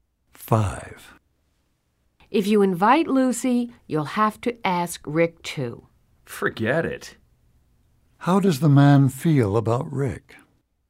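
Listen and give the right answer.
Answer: He doesn't like Rick and won't invite him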